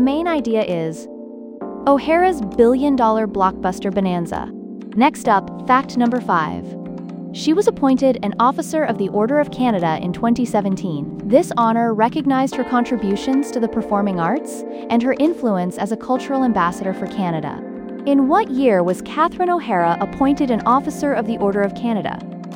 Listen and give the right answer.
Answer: Correct answer, 2017.